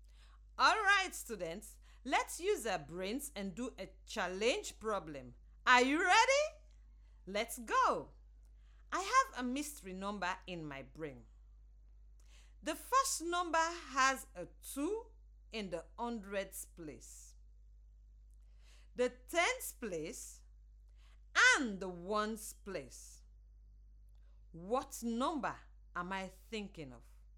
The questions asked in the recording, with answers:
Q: What number am I thinking of?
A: So the number is 222.